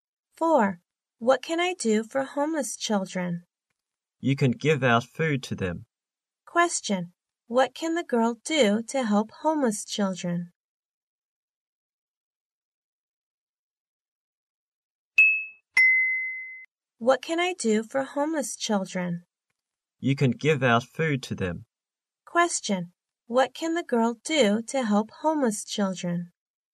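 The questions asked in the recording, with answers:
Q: What can the girl do to help homeless children?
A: Give out food to them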